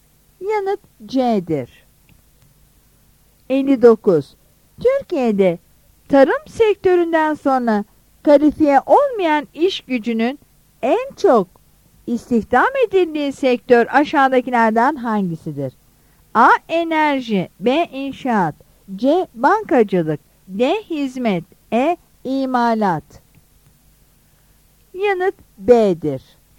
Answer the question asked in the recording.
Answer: Yanıt B'dir.